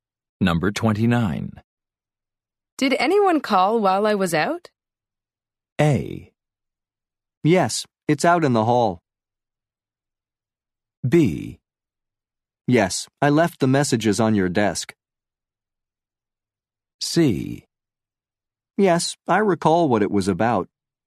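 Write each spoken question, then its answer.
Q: Did anyone call while I was out?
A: B: Yes, I left the messages on your desk.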